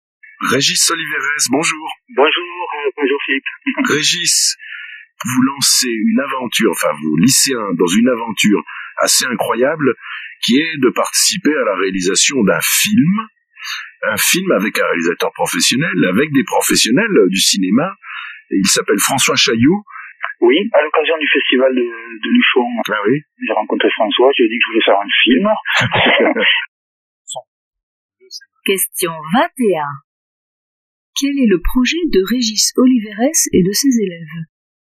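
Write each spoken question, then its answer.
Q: Quel est le projet de Régis Oliveres et de ses élèves ?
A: Participer à la réalisation d'un film avec un réalisateur professionnel (François Chailloux)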